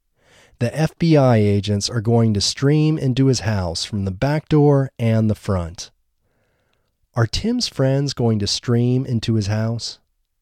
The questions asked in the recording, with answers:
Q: Are Tim's friends going to stream into his house?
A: No, Tim's friends aren't going to stream into his house.